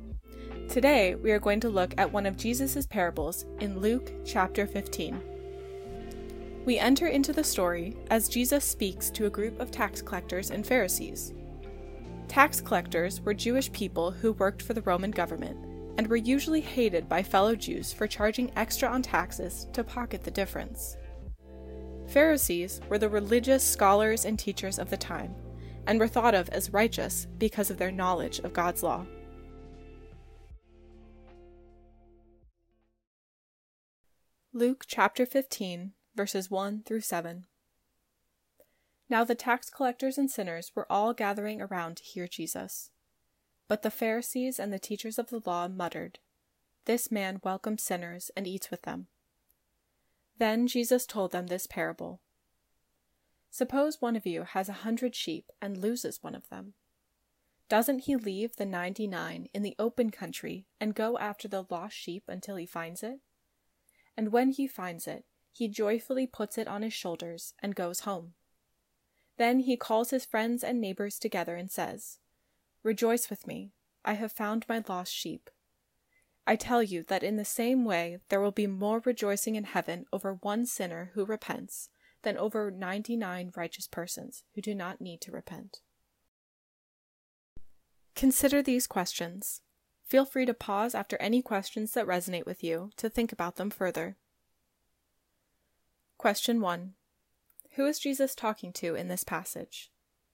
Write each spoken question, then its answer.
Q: Who is Jesus talking to in this passage?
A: The tax collectors, sinners, Pharisees, and teachers of the law